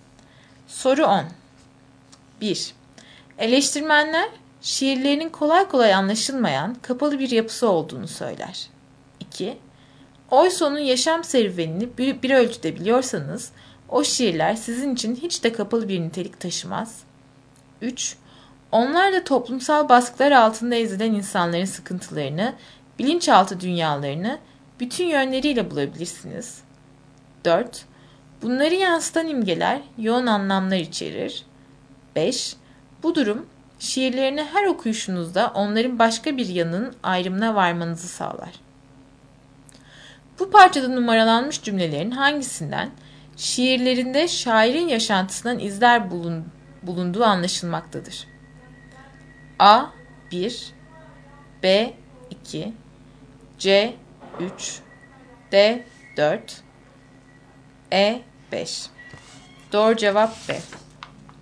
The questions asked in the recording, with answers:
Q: Bu parçada numaralanmış cümlelerin hangisinden, şiirlerinde şairin yaşantısından izler bulunduğu anlaşılmaktadır.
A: Doğru cevap B.